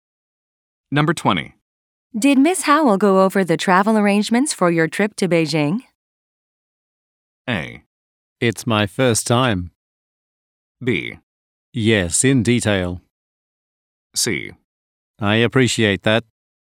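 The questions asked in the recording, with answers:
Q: Did Miss Howell go over the travel arrangements for your trip to Beijing?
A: B: Yes, in detail.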